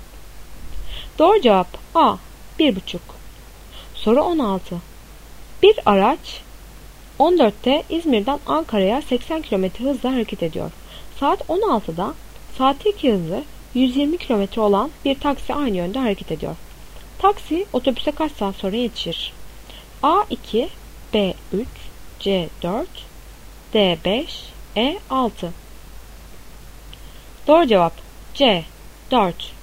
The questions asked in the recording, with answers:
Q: Taksi otobüse kaç saat sonra yetişir?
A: Doğru cevap C 4.